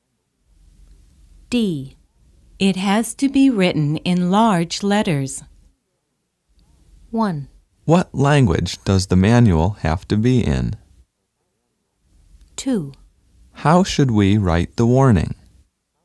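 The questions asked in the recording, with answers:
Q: It has to be written in large letters.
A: 2: How should we write the warning?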